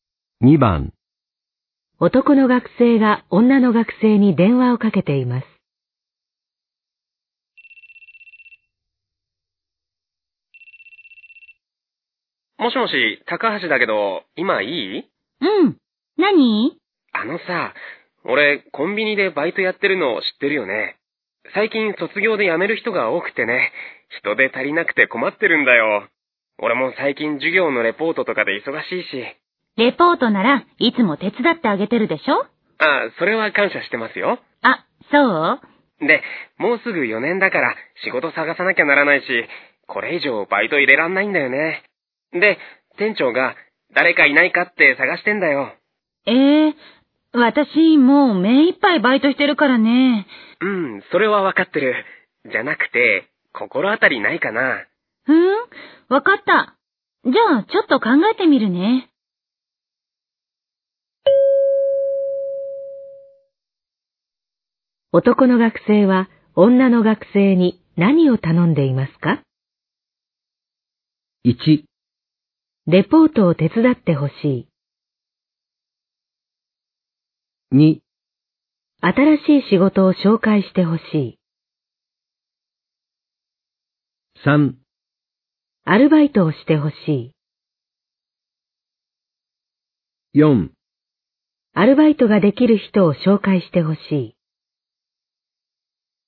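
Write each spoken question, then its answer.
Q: 男の学生は女の学生に何を頼んでいますか?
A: 4: アルバイトができる人を紹介してほしい。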